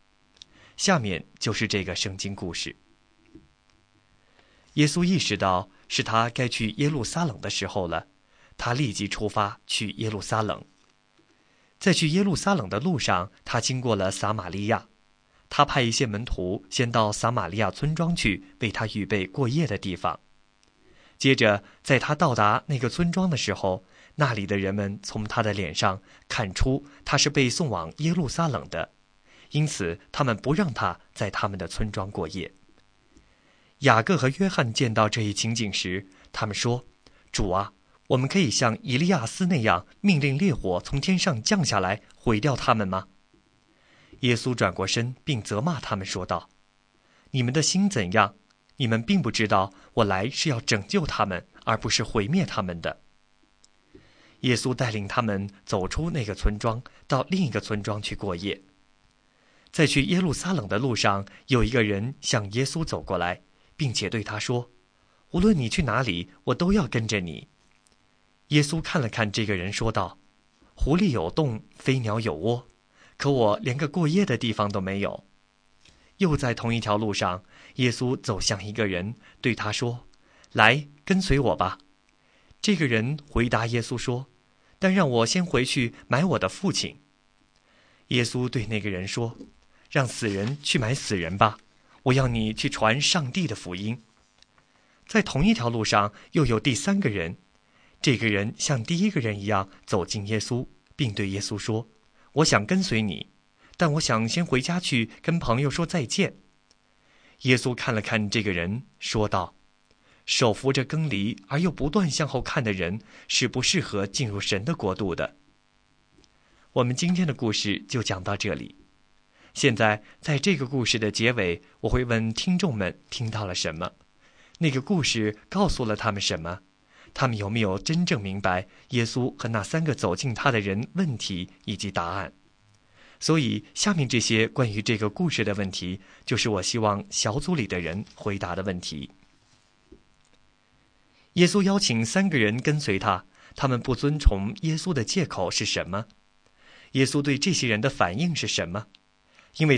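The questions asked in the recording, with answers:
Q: 他们不遵从耶稣的借口是什么?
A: 一个要先回去埋葬父亲,一个要先回家跟朋友说再见

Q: 耶稣对这些人的反应是什么?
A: 狐狸有洞,飞鸟有窝,他却没有过夜的地方;让死人去埋死人,你去传上帝的福音;手扶着犁而向后看的人不适合进神的国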